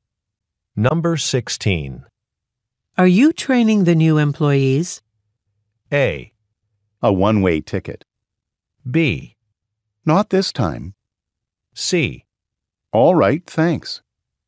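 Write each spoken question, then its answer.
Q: Are you training the new employees?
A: B: Not this time.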